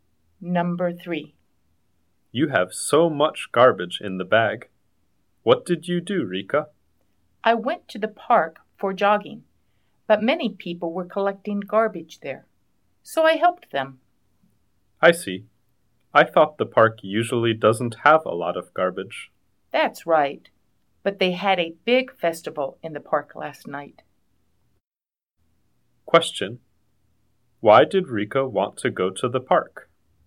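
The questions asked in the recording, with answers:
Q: Why did Rika want to go to the park?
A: To go jogging.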